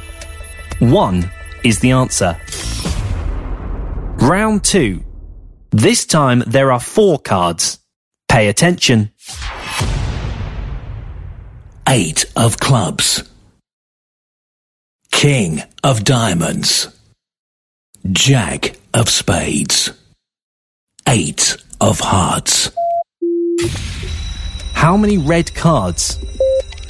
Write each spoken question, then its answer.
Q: How many red cards?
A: 2 is the answer.